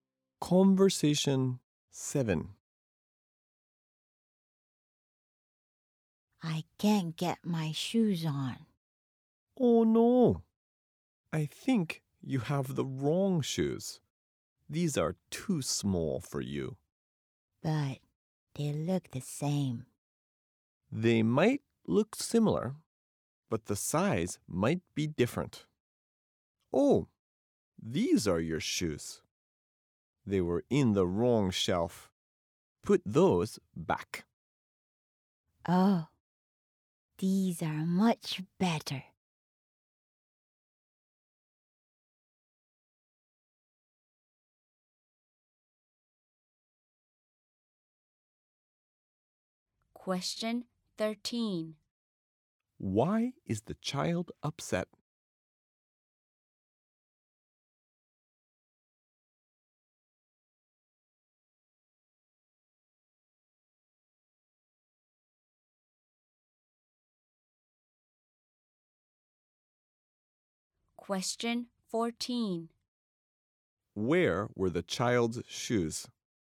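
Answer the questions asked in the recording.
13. He can't get his shoes on because they are the wrong shoes and too small.
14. On the wrong shelf.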